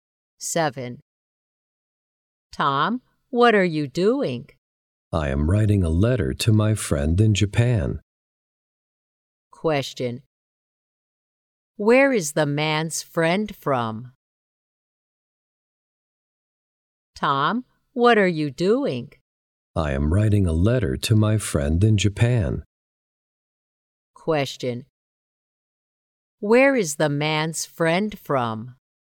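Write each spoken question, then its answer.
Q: Where is the man's friend from?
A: Japan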